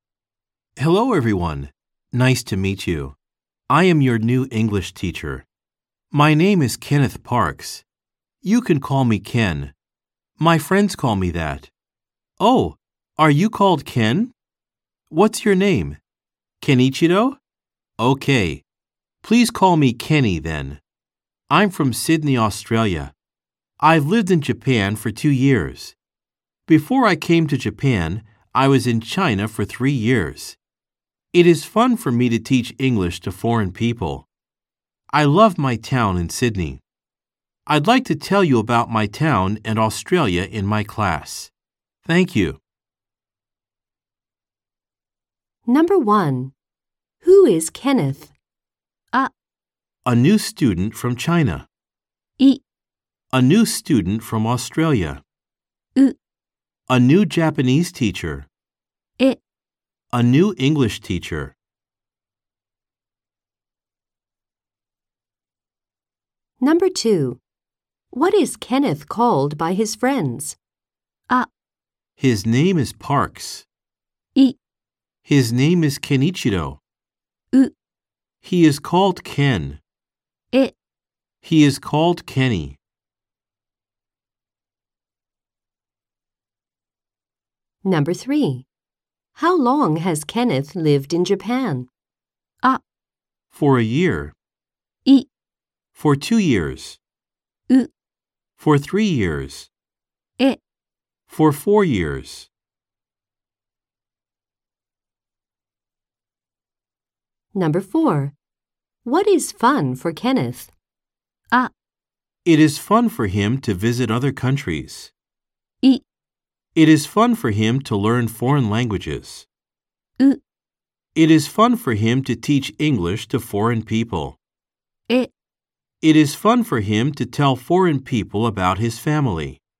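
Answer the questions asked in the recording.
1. え: A new English teacher.
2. う: He is called Ken.
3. い: For 2 years.
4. う: It is fun for him to teach English to foreign people.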